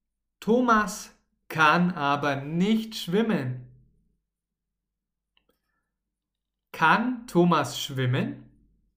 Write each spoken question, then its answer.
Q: Kann Thomas schwimmen?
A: Nein, er kann nicht schwimmen.